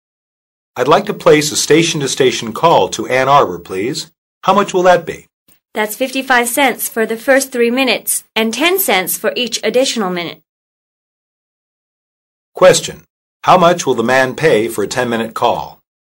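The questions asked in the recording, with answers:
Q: How much will the man pay for a 10-minute call?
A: $1.25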